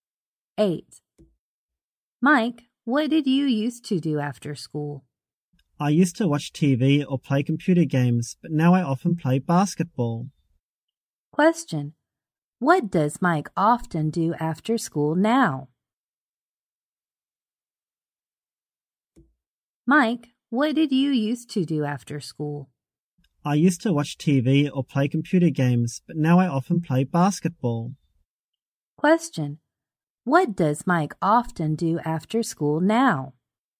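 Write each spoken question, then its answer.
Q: What does Mike often do after school now?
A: He plays basketball.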